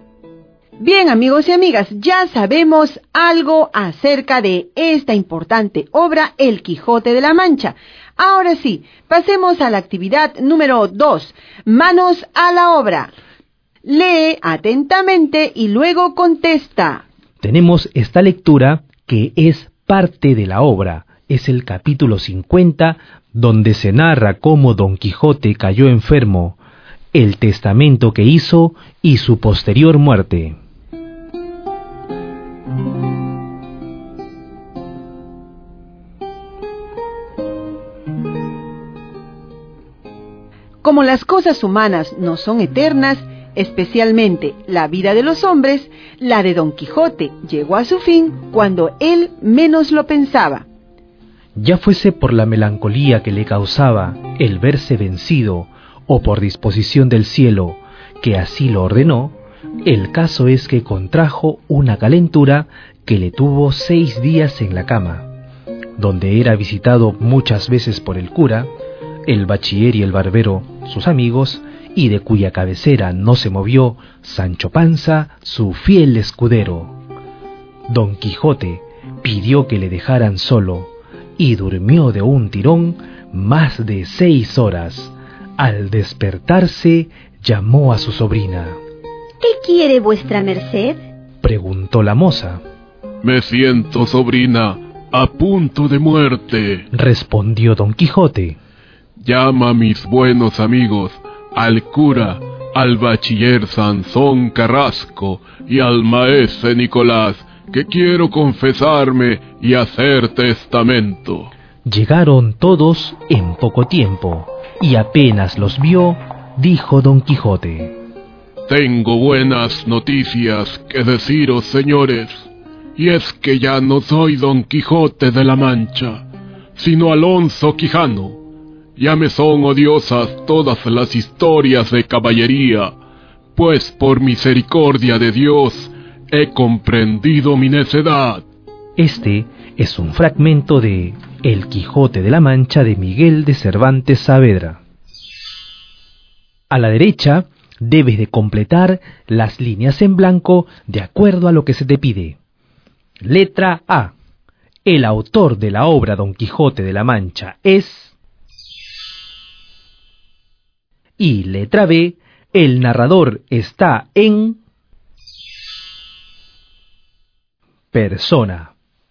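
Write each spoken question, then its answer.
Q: El autor de la obra Don Quijote de la Mancha es...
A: Miguel de Cervantes Saavedra

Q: el narrador está en...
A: tercera persona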